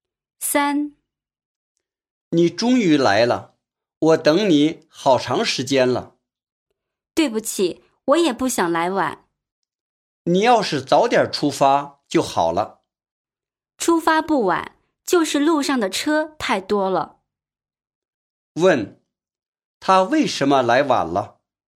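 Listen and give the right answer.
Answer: 路上的车太多了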